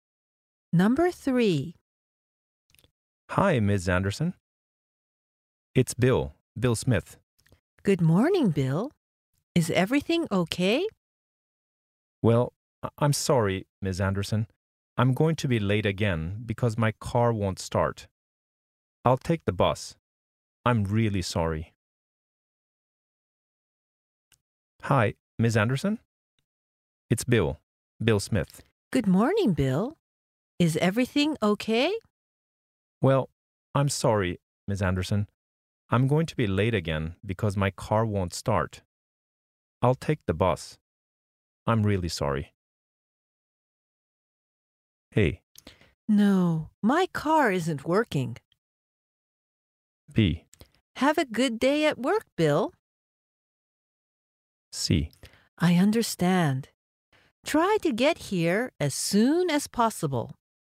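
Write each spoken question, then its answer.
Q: I'll take the bus. I'm really sorry.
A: C: I understand. Try to get here as soon as possible.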